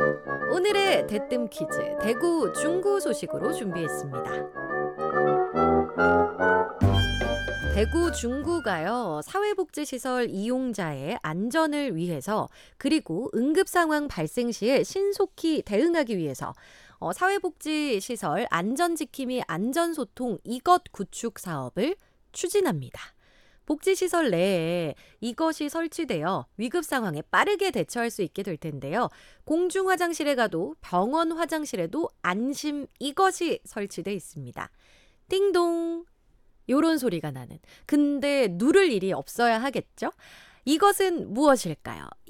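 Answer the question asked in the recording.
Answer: 비상벨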